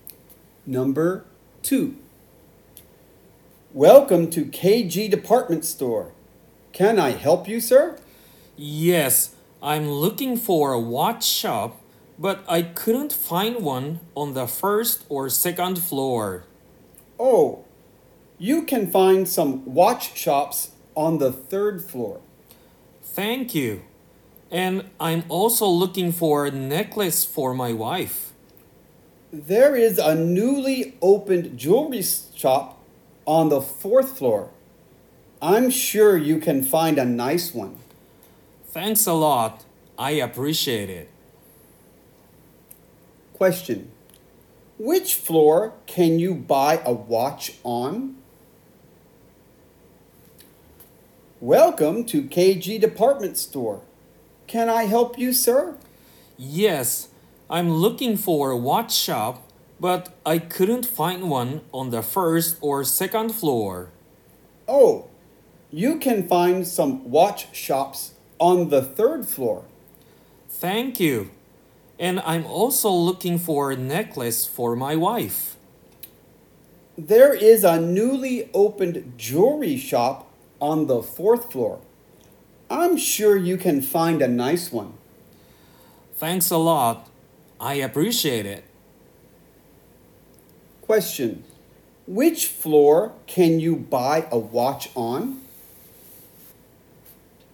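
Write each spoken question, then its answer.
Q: Which floor can you buy a watch on?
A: The third floor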